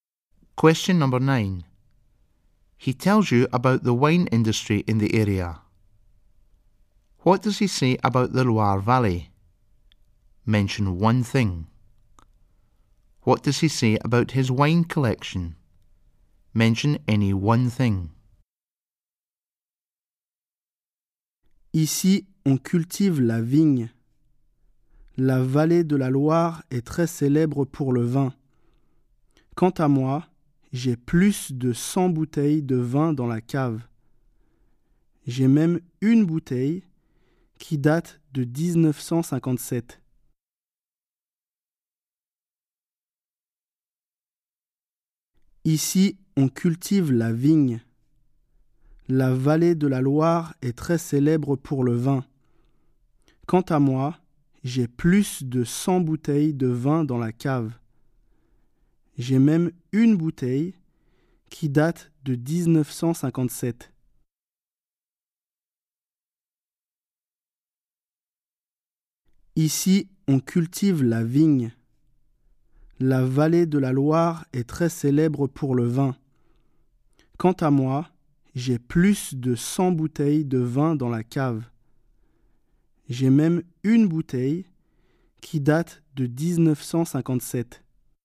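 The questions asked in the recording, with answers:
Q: What does he say about the Loire Valley?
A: They grow vines there; it is very famous for wine

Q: What does he say about his wine collection?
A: He has over 100 bottles in the cellar; one bottle dates from 1957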